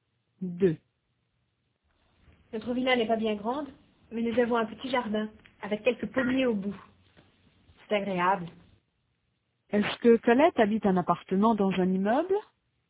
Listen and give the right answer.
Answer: Non, elle habite dans une villa.